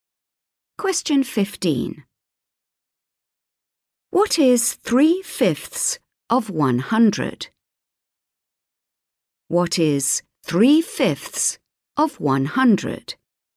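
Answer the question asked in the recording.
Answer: 60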